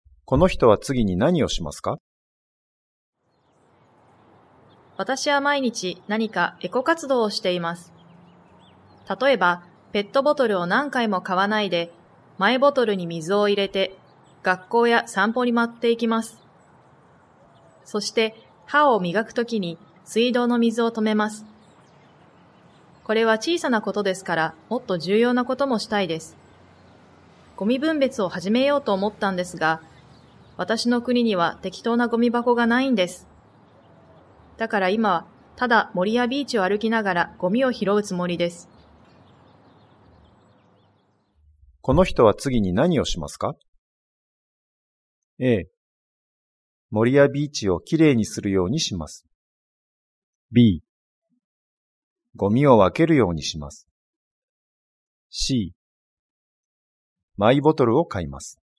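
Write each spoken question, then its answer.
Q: この人は次に何をしますか?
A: A: 森やビーチをきれいにするようにします。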